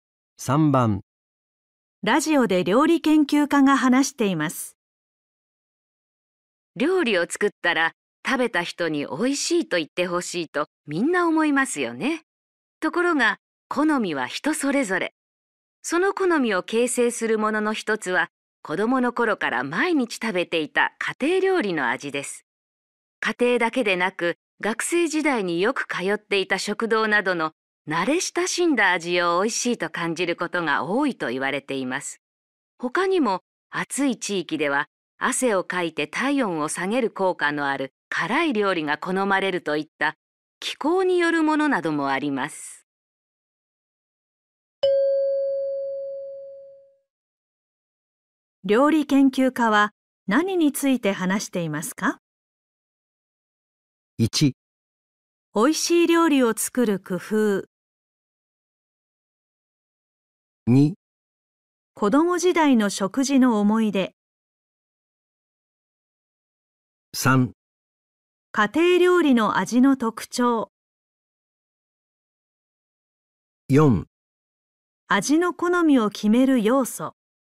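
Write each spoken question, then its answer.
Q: 料理研究家は何について話していますか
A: 4: 味の好みを決める要素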